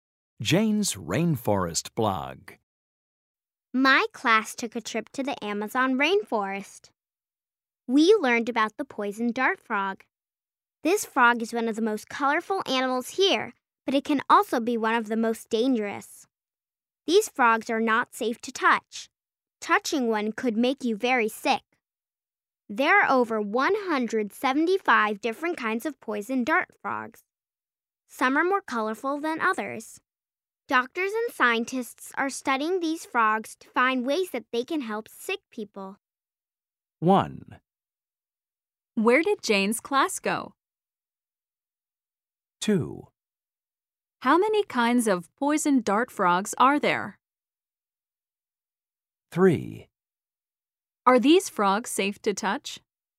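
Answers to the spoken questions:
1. To the Amazon rainforest
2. Over 175
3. No, they are not safe to touch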